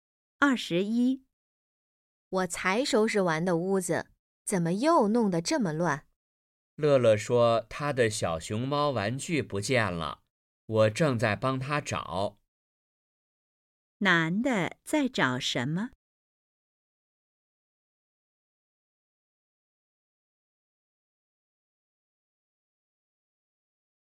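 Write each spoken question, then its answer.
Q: 男的在找什么?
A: 乐乐的小熊猫玩具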